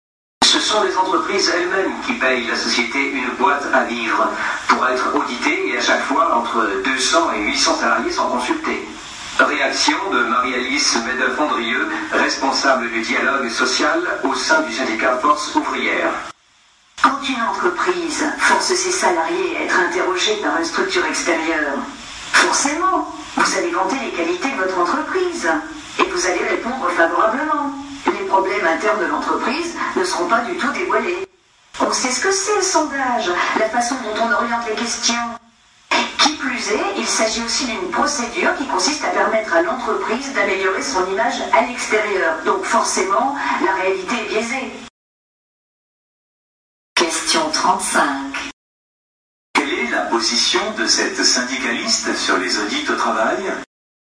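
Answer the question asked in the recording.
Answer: Elle est critique : les audits sont biaisés, les salariés répondent favorablement et ils servent surtout l'image de l'entreprise.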